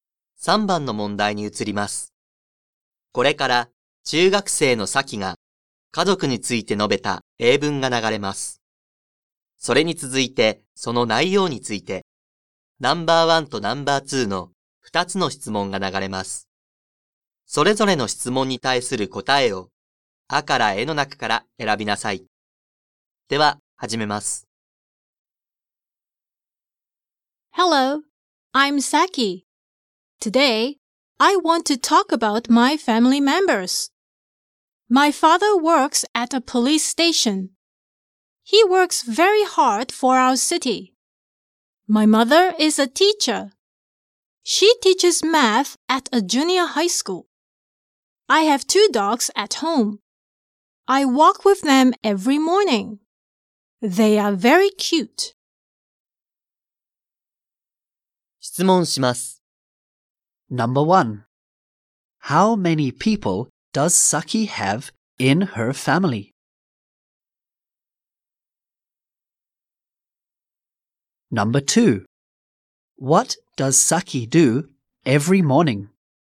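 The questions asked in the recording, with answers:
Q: What does Saki do every morning?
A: She walks with her dogs.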